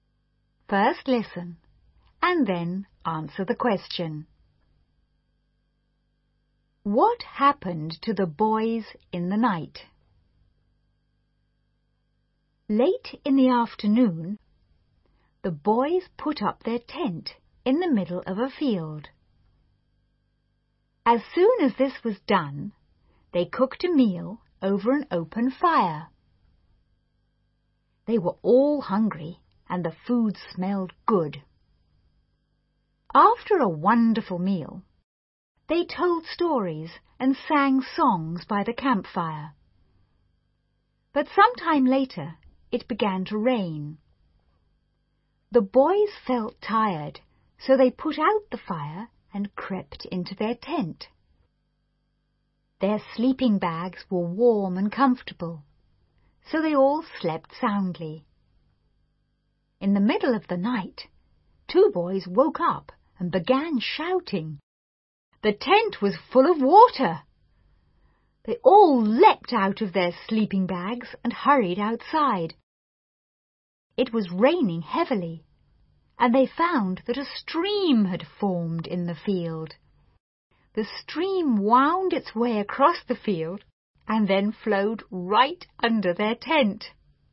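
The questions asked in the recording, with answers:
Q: What happened to the boys in the night?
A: A stream formed in the field and flowed under their tent, filling it with water.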